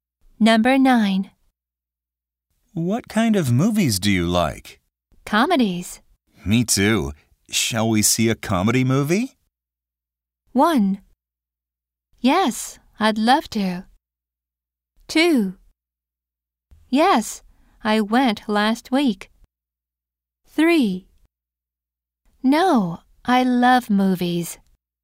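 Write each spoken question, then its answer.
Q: Me too. Shall we see a comedy movie?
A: 1: Yes, I'd love to.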